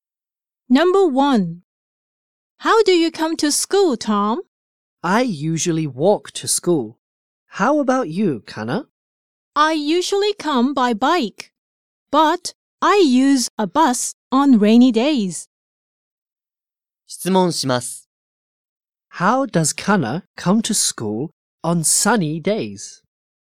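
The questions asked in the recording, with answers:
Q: How does Kana come to school on sunny days?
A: By bike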